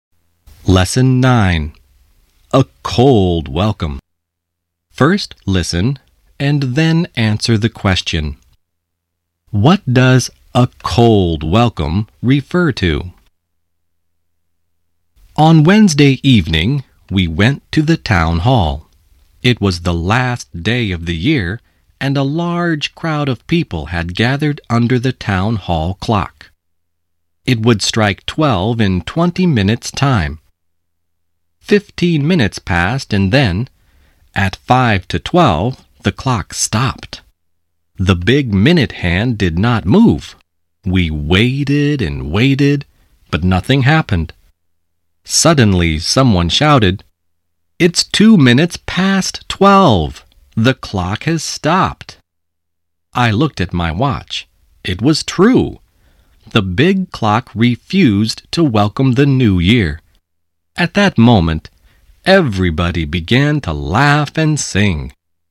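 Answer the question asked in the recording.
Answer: The town hall clock stopped and refused to welcome the new year.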